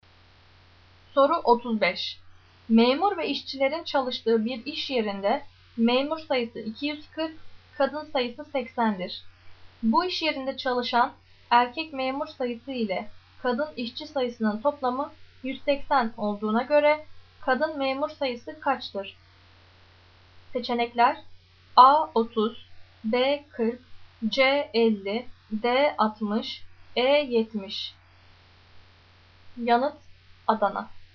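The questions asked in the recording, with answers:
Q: Bu iş yerinde çalışan erkek memur sayısı ile kadın işçi sayısının toplamı 180 olduğuna göre kadın memur sayısı kaçtır?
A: E: 70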